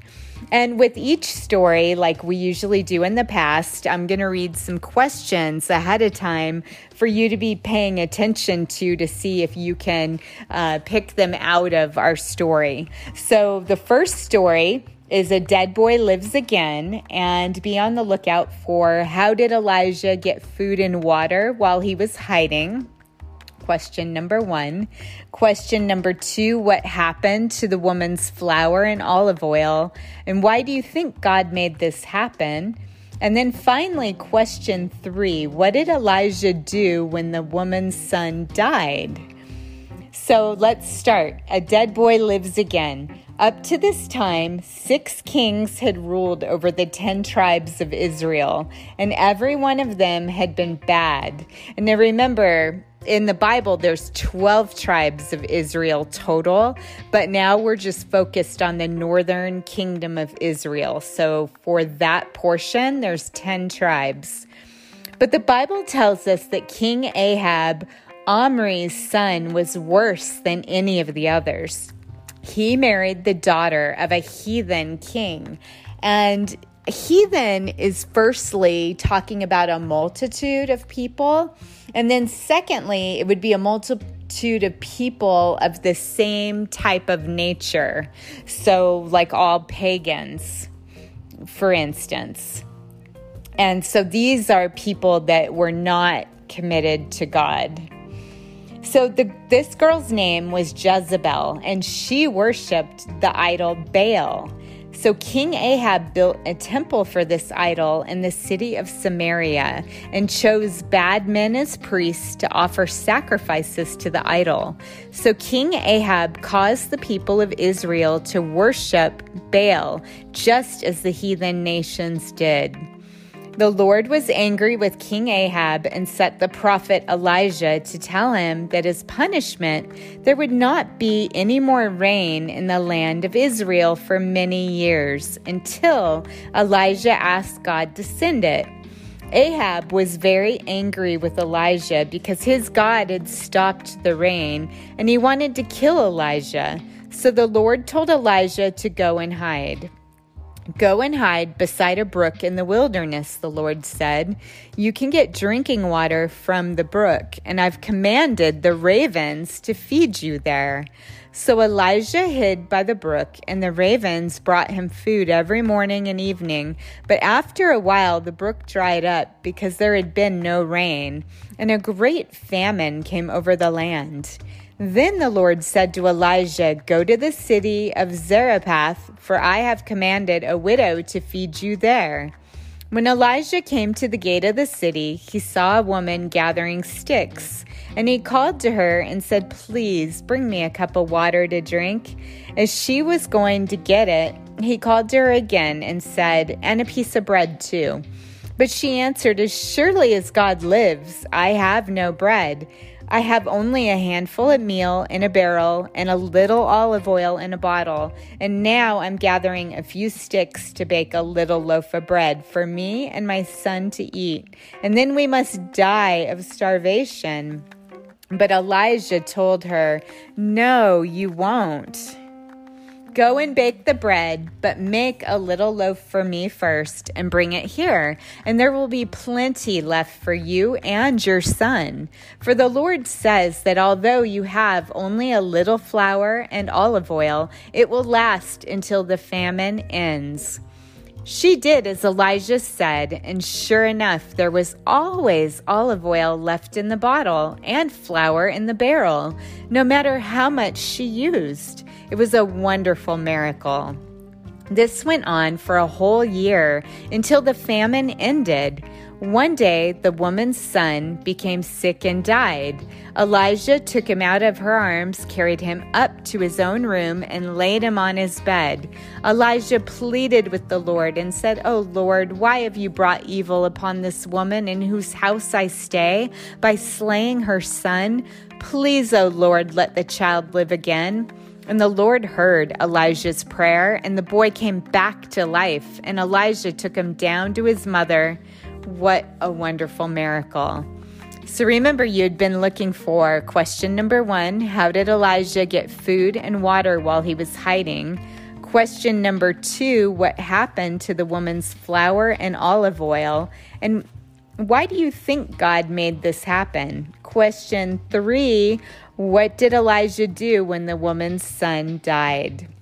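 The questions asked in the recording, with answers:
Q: how did Elijah get food and water while he was hiding?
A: He drank water from the brook, and ravens brought him food every morning and evening

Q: what happened to the woman's flour and olive oil?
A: They never ran out; there was always flour and oil left until the famine ended

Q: what did Elijah do when the woman's son died?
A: He carried him to his room, laid him on his bed and prayed to the Lord, and the boy came back to life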